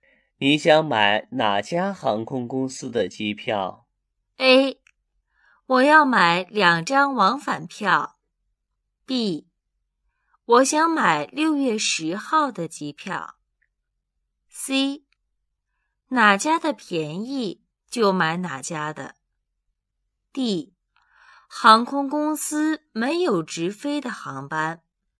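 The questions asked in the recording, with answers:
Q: 你想买哪家航空公司的机票?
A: C: 哪家的便宜就买哪家的。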